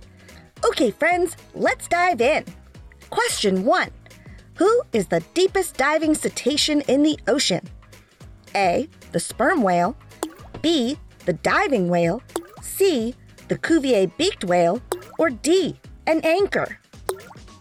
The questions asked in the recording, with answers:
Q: Who is the deepest diving cetacean in the ocean?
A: And the answer is C.